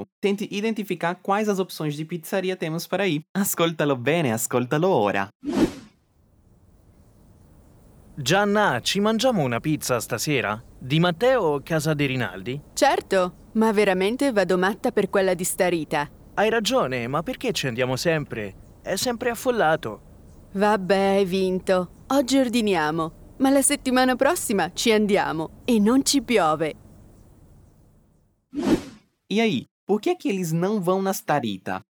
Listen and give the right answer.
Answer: É sempre affollato.